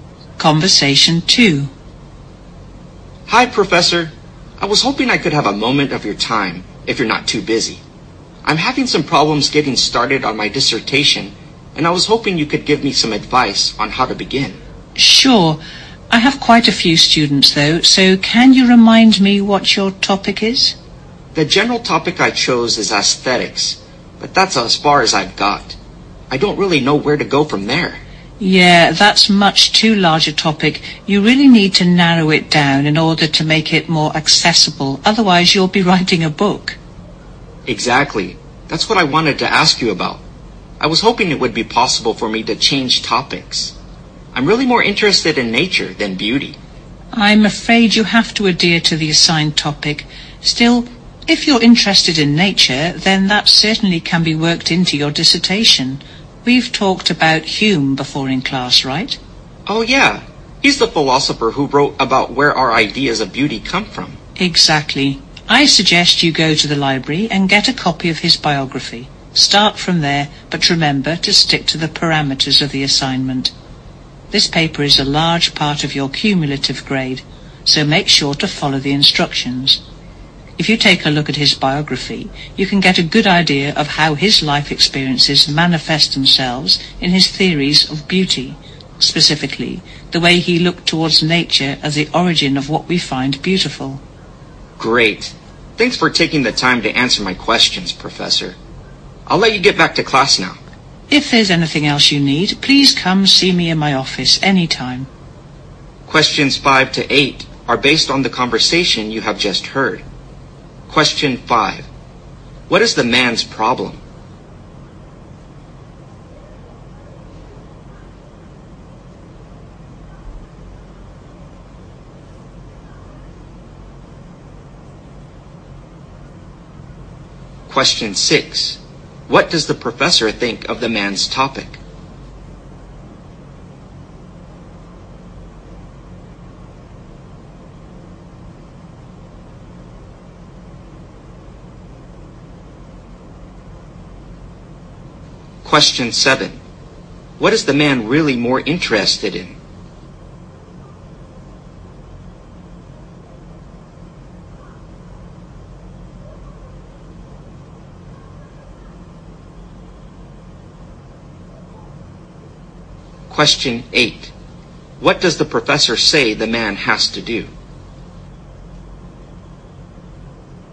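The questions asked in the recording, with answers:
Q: What is the man's problem?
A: He has trouble getting started on his dissertation

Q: What does the professor think of the man's topic?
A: It is much too large and needs narrowing down

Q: What is the man really more interested in?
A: Nature

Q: What does the professor say the man has to do?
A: Stick to the assigned topic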